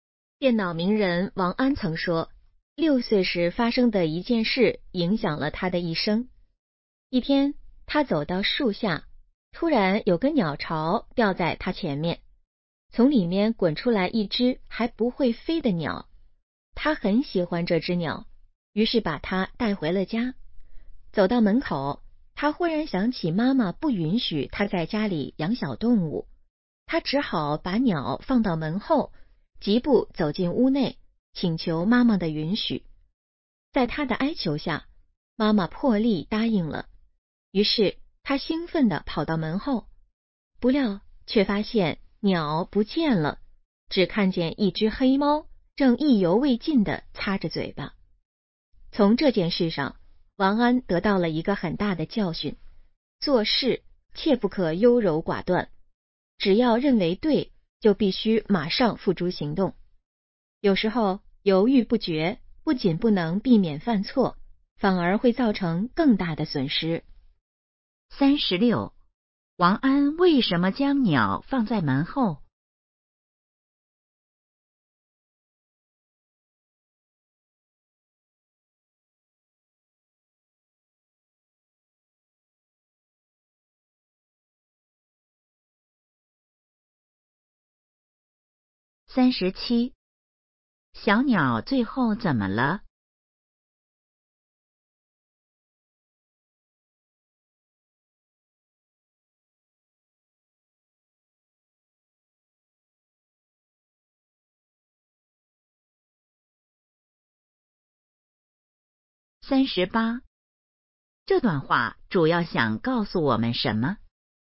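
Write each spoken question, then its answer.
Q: 王安为什么将鸟放在门后?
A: 妈妈不允许他在家里养小动物

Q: 小鸟最后怎么了?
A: 被黑猫吃了

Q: 这段话主要想告诉我们什么?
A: 做事不可优柔寡断,认为对就马上行动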